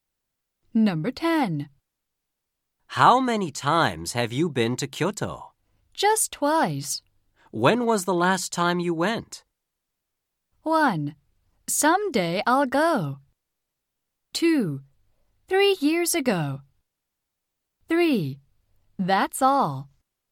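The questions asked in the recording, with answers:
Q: When was the last time you went?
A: 2: 3 years ago.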